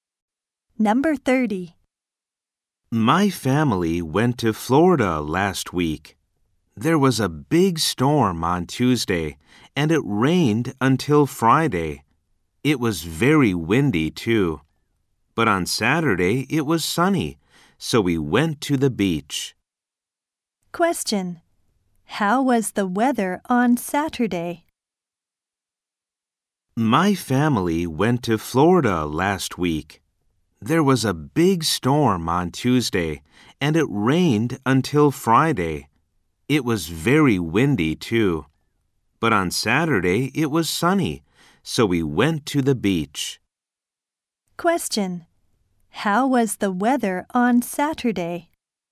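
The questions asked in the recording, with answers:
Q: How was the weather on Saturday?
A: It was sunny.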